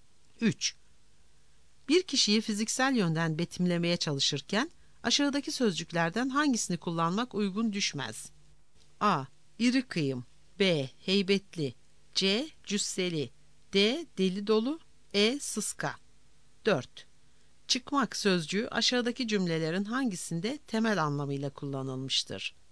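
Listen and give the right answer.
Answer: D: Deli dolu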